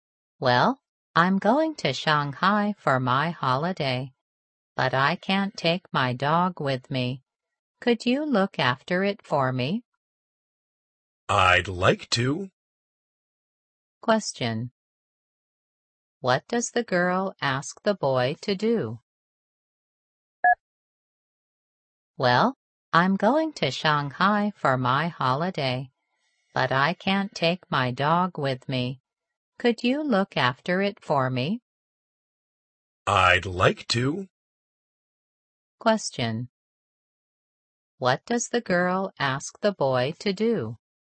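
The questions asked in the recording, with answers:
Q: What does the girl ask the boy to do?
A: Look after her dog.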